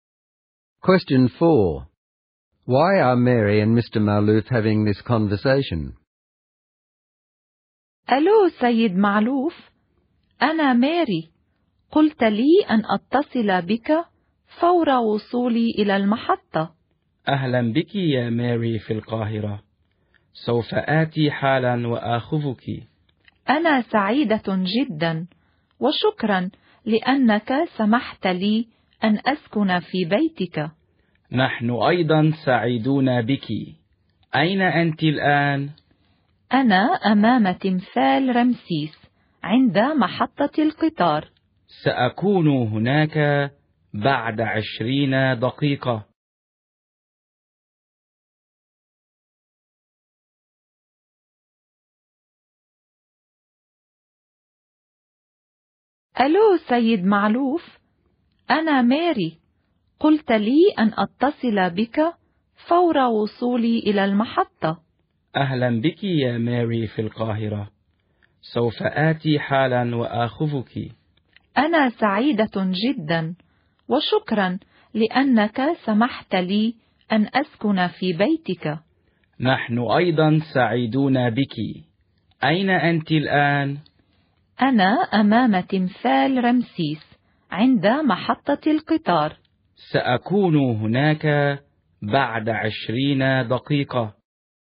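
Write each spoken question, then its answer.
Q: Why are Mary and Mr. Malouf having this conversation?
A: Mary has arrived at the Cairo train station, where he told her to call him, so he can come and pick her up. She will be staying at his house.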